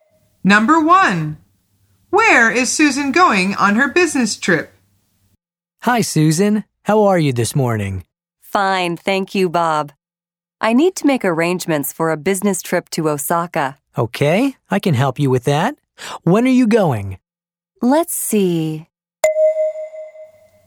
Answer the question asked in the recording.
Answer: The answer is Osaka.